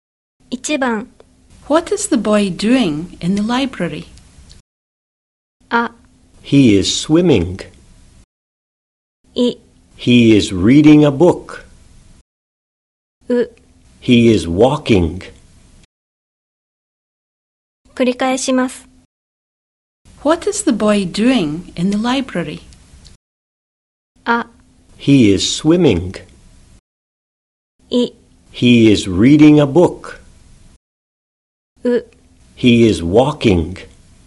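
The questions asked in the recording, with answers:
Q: What is the boy doing in the library?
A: I: He is reading a book.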